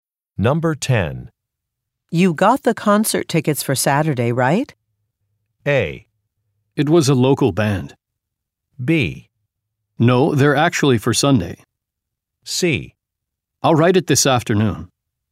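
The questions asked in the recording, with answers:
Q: You got the concert tickets for Saturday, right?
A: B: No, they're actually for Sunday.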